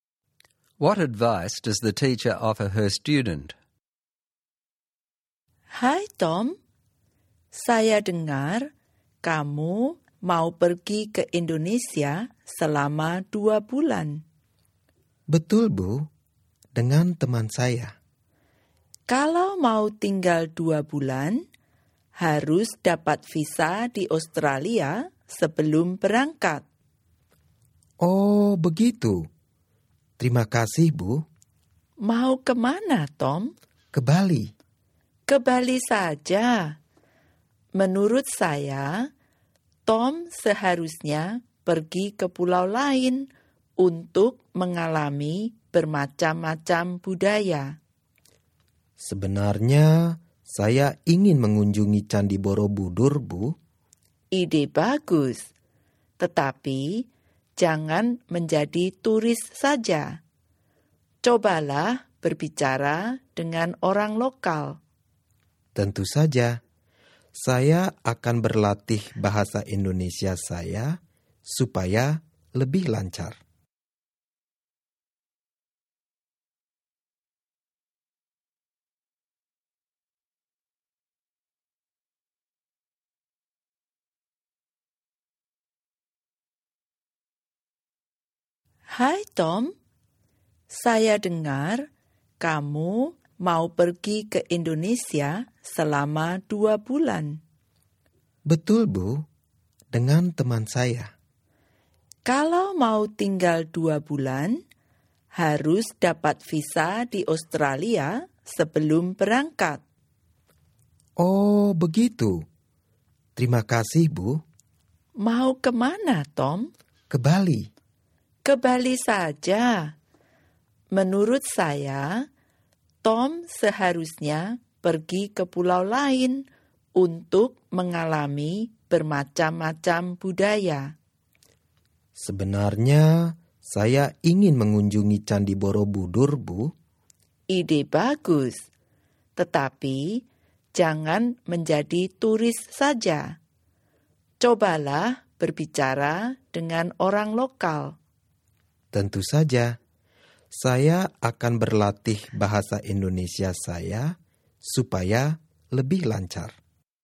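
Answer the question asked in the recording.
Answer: Get a visa in Australia before leaving, visit other islands besides Bali to experience different cultures, and talk with local people rather than just being a tourist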